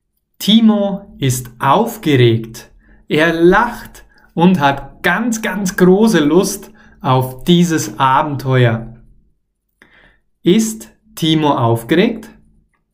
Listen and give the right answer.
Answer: Ja, klar. Timo ist aufgeregt.